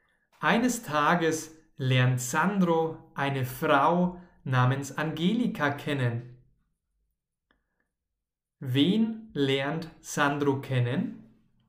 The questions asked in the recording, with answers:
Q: Wen lernt Sandro kennen?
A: Eine Frau namens Angelika.